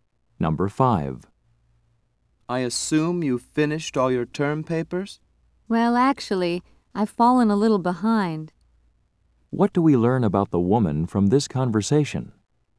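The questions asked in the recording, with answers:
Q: What do we learn about the woman from this conversation?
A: She hasn't finished her term papers.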